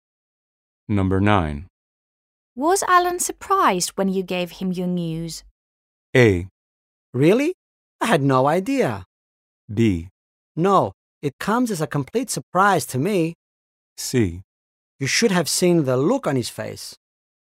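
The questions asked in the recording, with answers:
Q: Was Alan surprised when you gave him your news?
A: C: You should have seen the look on his face.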